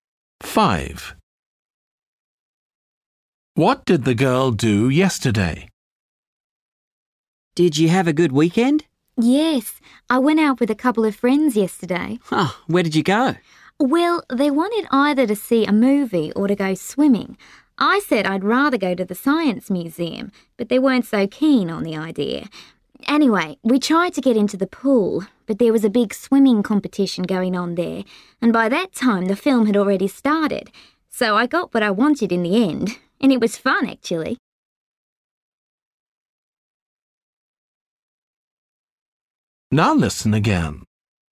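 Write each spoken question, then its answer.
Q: What did the girl do yesterday?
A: went to the science museum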